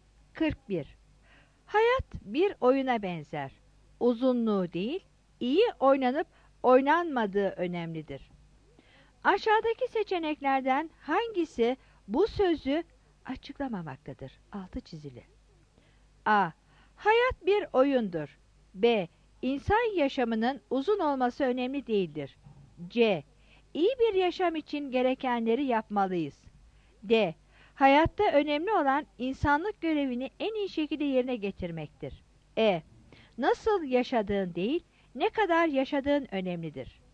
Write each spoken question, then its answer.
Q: Aşağıdaki seçeneklerden hangisi bu sözü açıklamamaktadır?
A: 41 E